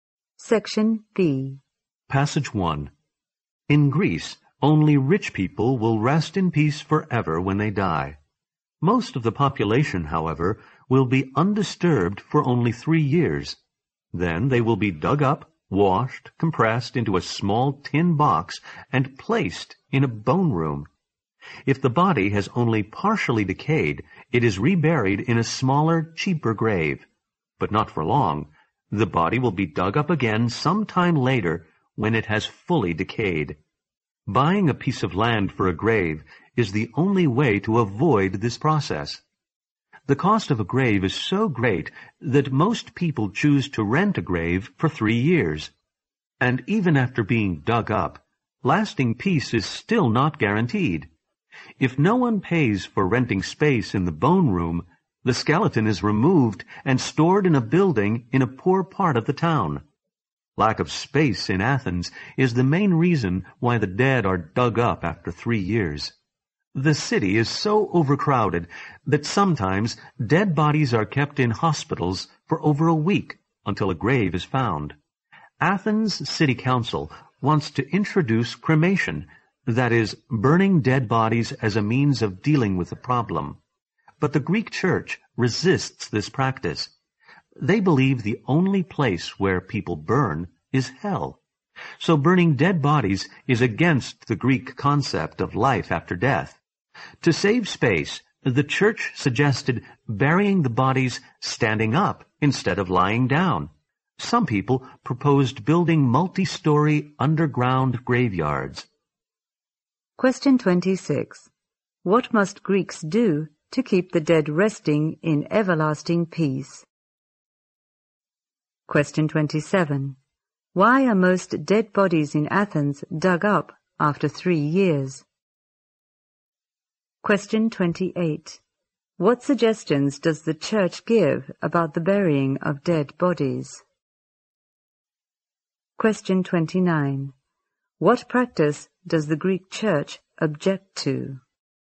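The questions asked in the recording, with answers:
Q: What must Greeks do to keep the dead resting in everlasting peace?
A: Buy a piece of land for a grave.

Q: Why are most dead bodies in Athens dug up after 3 years?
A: Lack of space in Athens.

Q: What suggestions does the church give about the burying of dead bodies?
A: Bury them standing up instead of lying down.

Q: What practice does the Greek church object to?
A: Cremation (burning dead bodies).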